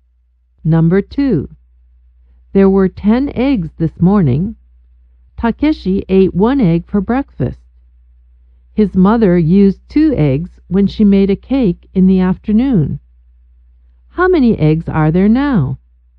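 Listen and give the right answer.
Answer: Seven.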